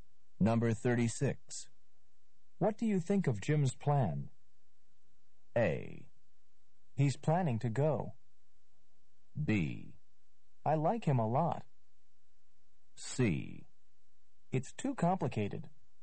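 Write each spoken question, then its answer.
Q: What do you think of Jim's plan?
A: C: It's too complicated.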